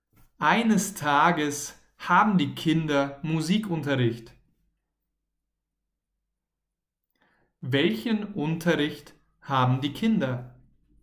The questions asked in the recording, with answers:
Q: Welchen Unterricht haben die Kinder?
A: Musikunterricht. Die Kinder haben Musikunterricht.